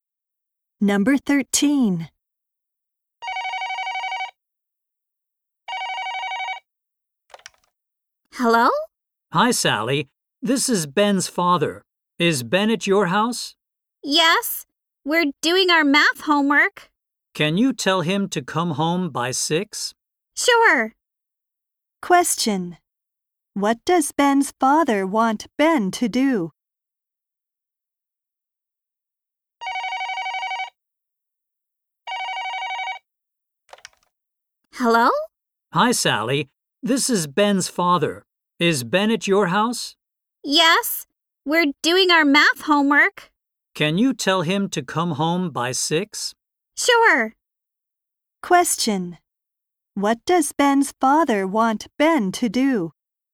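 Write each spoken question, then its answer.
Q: What does Ben's father want Ben to do?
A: Come home by 6.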